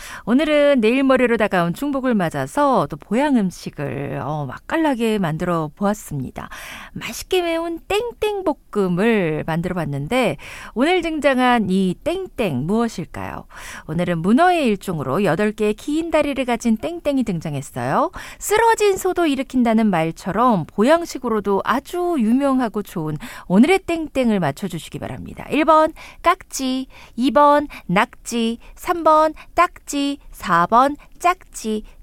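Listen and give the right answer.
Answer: 2: 낙지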